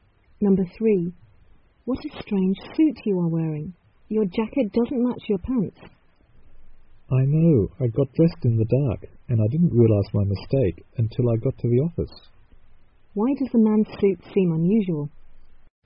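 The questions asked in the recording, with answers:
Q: Why does the man's suit seem unusual?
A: His jacket doesn't match his pants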